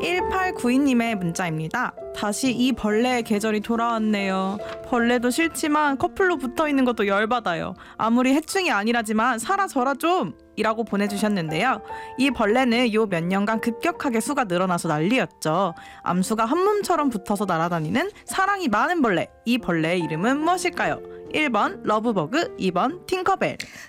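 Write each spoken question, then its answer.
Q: 이 벌레의 이름은 무엇일까요? 1번 러브버그, 2번 팅커벨.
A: 1번: 러브버그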